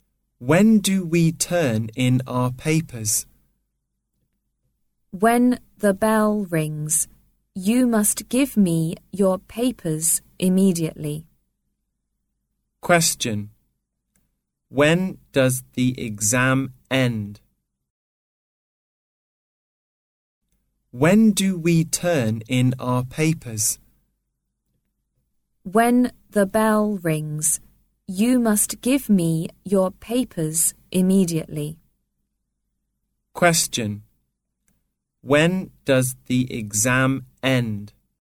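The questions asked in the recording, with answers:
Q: When does the exam end?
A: When the bell rings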